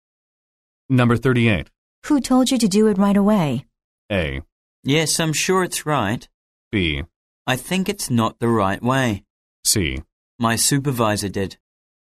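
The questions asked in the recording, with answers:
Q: Who told you to do it right away?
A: C: My supervisor did.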